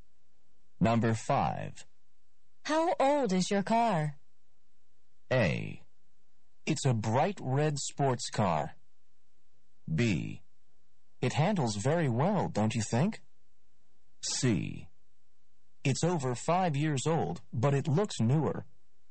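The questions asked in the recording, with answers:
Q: How old is your car?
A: C: It's over 5 years old, but it looks newer.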